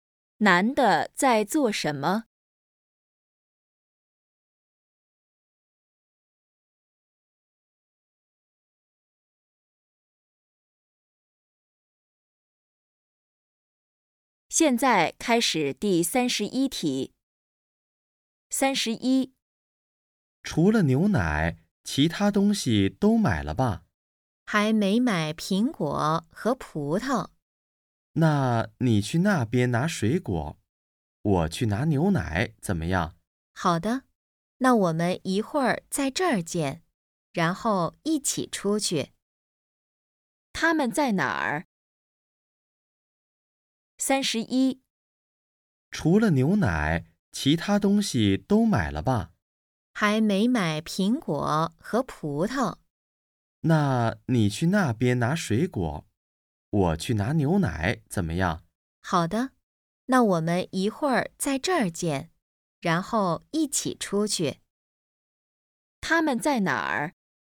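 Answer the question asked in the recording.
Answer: 超市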